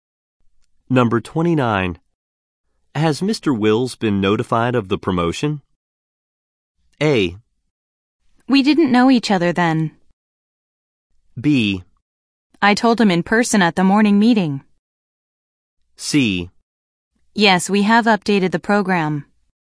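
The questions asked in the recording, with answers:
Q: Has Mr. Wills been notified of the promotion?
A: B: I told him in person at the morning meeting.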